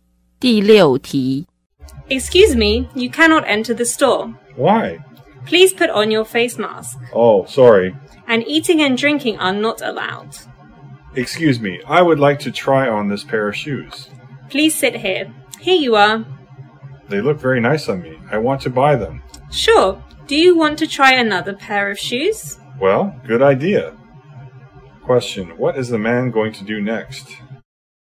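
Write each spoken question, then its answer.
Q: what is the man going to do next?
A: Try on another pair of shoes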